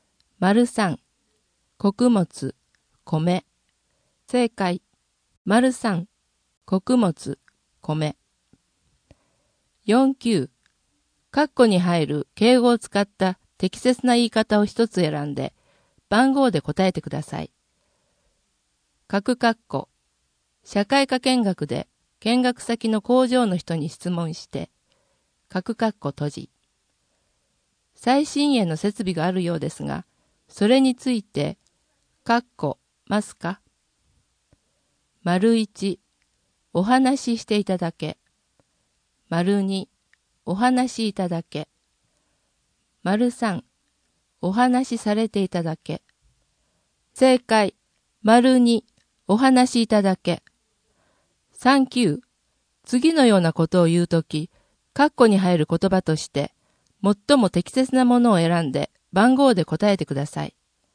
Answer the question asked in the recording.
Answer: 正解、2、お話しいただけ。